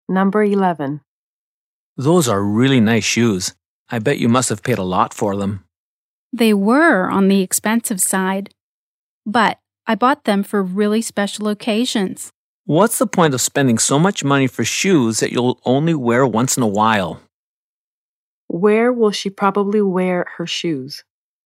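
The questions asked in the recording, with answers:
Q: Where will she probably wear her shoes?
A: On really special occasions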